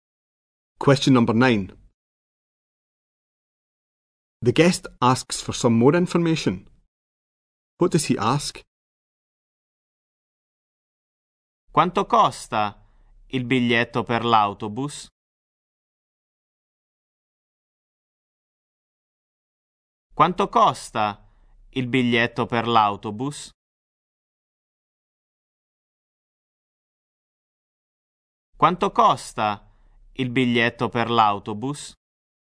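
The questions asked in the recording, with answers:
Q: What does he ask?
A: How much the bus ticket costs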